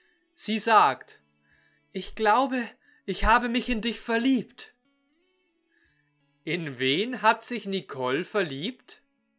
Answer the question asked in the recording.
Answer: In Thomas. Nicole hat sich in Thomas verliebt.